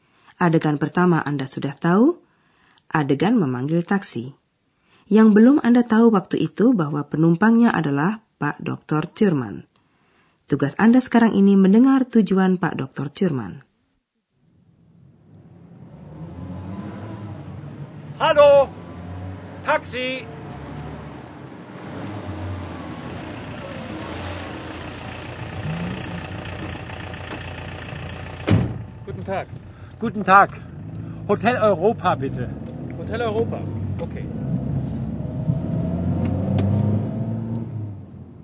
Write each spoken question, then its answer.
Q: Tugas Anda sekarang ini mendengar tujuan Pak Dr.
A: Ya, begitu Dr. Thurman mau diantar ke Hotel Eropa atau Hotel Europa.